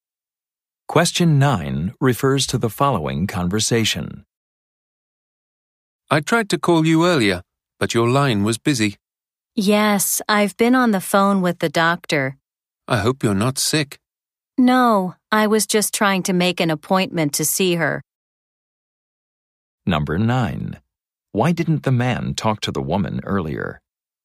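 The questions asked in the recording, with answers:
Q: Why didn't the man talk to the woman earlier?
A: He was on the phone with the doctor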